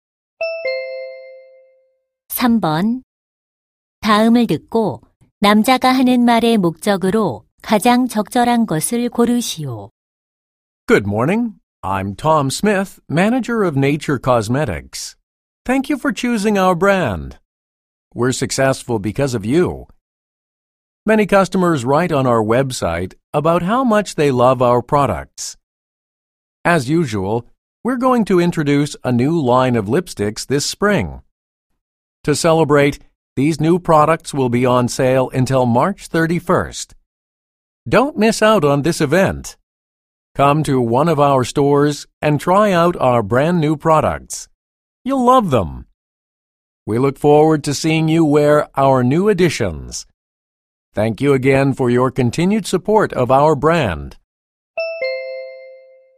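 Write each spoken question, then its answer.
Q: 다음을 듣고 남자가 하는 말의 목적으로 가장 적절한 것을 고르시오.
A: 신제품 립스틱 할인 행사를 홍보하려고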